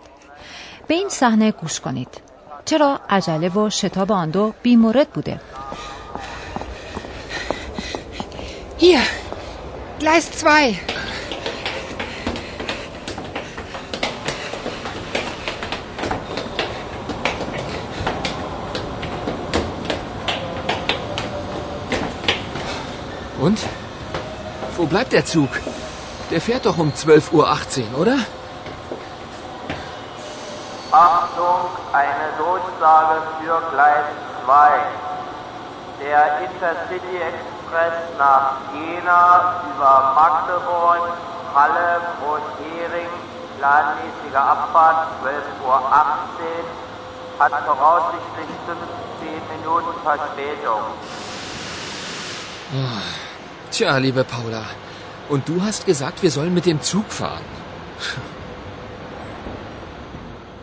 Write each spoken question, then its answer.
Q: چرا عجله و شتاب آن دو مورد بوده؟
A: قطاری که قرار است پالا و فیلیپ را به ینا برساند احتمالاً 15 دقیقه تأخیر دارد.